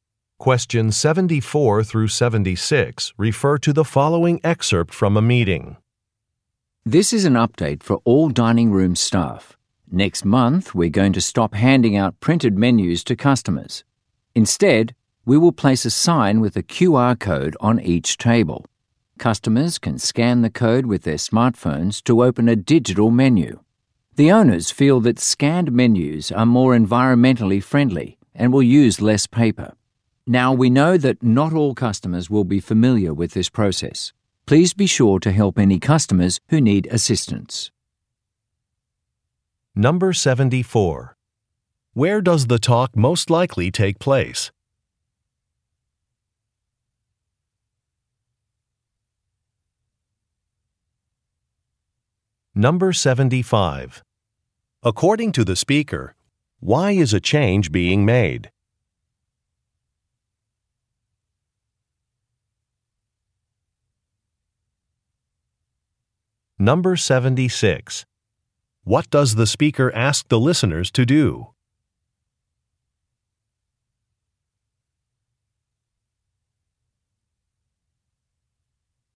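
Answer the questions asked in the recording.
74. At a restaurant
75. To be more environmentally friendly and use less paper
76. Help customers who need assistance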